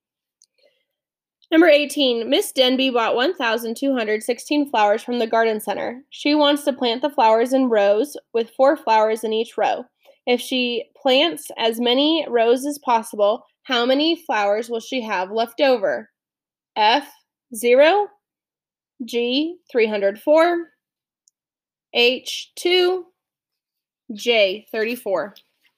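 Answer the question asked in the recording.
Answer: F: 0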